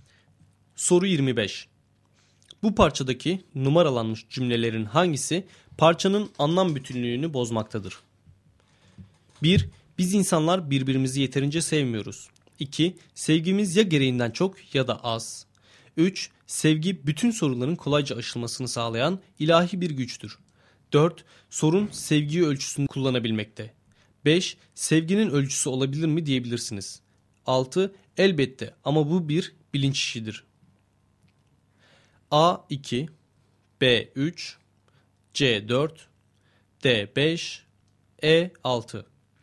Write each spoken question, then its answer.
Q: Bu parçadaki numaralanmış cümlelerin hangisi parçanın anlam bütünlüğünü bozmaktadır?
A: Doğru cevap B şıkkı.